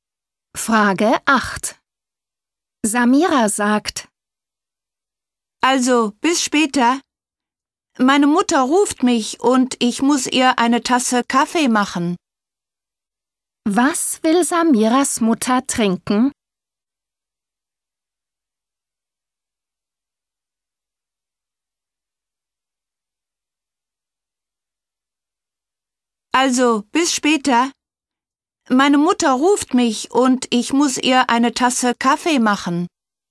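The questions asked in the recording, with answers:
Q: Was will Samiras Mutter trinken?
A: Kaffee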